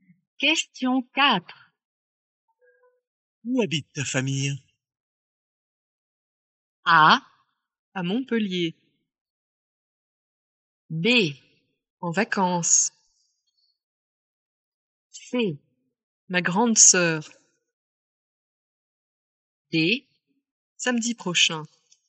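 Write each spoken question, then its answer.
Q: Où habite ta famille?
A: A: À Montpellier.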